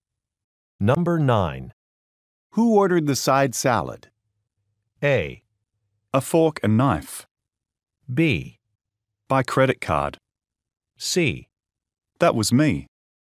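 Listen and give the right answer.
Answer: C: That was me.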